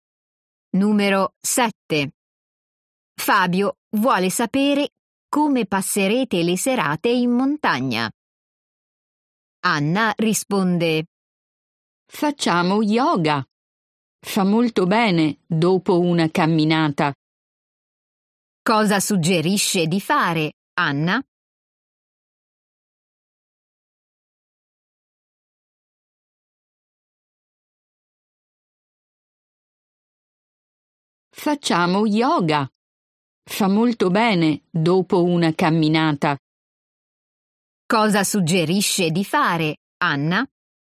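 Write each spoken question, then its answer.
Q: Cosa suggerisce di fare, Anna?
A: Yoga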